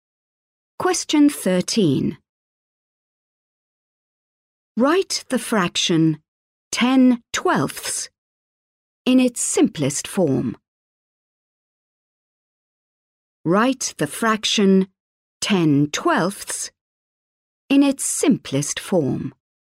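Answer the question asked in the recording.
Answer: 5/6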